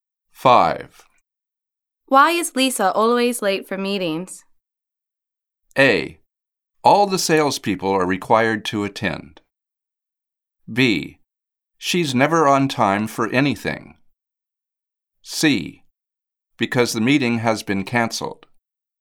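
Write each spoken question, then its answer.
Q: Why is Lisa always late for meetings?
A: B: She's never on time for anything.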